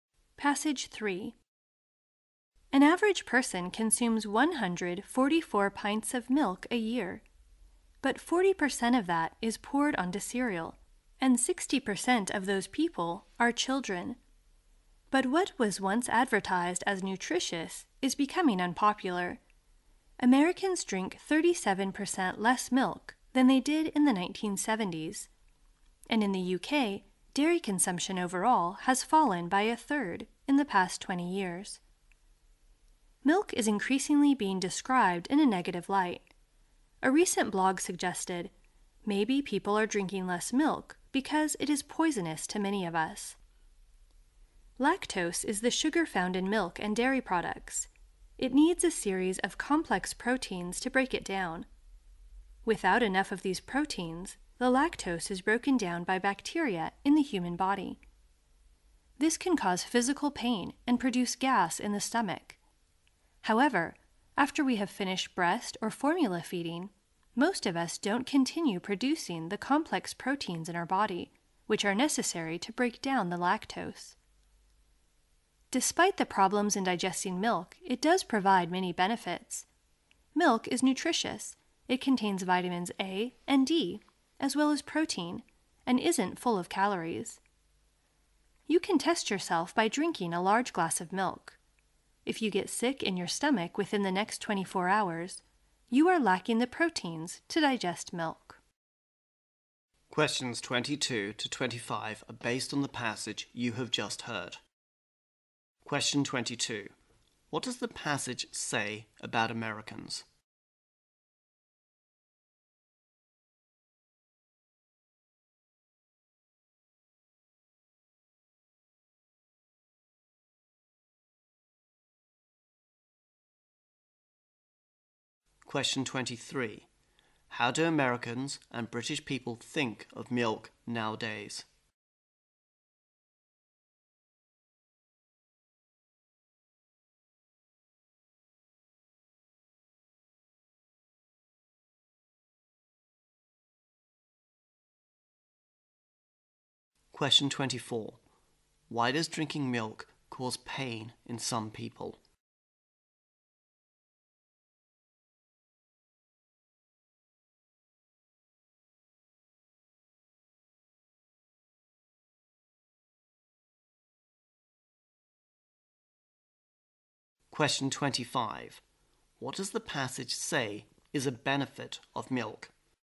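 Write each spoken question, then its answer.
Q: What does the passage say about Americans?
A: They drink 37% less milk than in the 1970s

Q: How do Americans and British people think of milk nowadays?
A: More negatively; it's becoming unpopular

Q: Why does drinking milk cause pain in some people?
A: They lack the proteins needed to break down lactose

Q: What does the passage say is a benefit of milk?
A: It is nutritious, with vitamins A and D and protein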